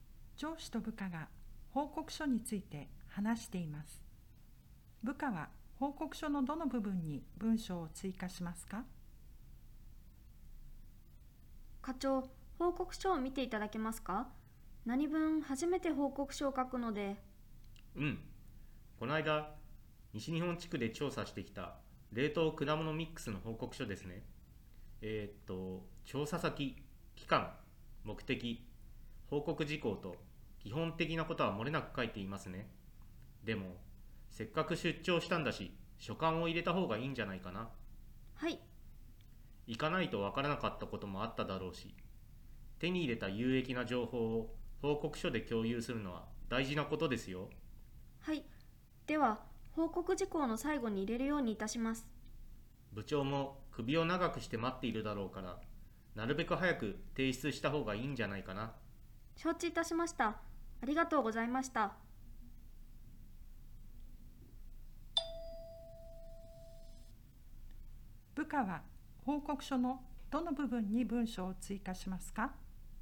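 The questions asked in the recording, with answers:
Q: 部下は報告書のどの部分に文章を追加しますか?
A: 報告事項の最後(所感を入れる)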